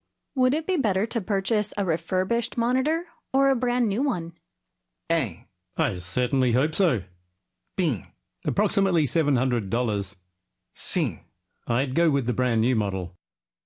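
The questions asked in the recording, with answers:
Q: Would it be better to purchase a refurbished monitor or a brand new one?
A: C: I'd go with the brand new model.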